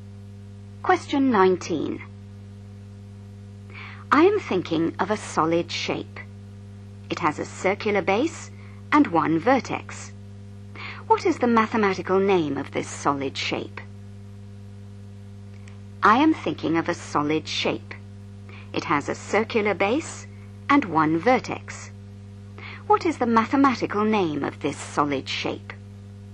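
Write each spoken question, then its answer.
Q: What is the mathematical name of this solid shape?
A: cone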